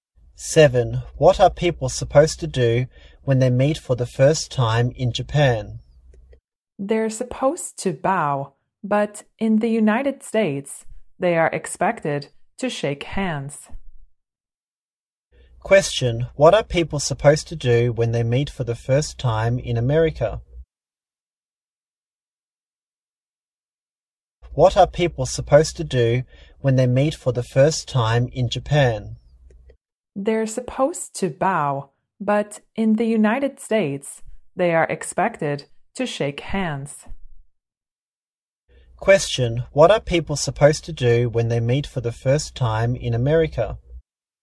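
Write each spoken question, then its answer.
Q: What are people supposed to do when they meet for the first time in America?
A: Shake hands.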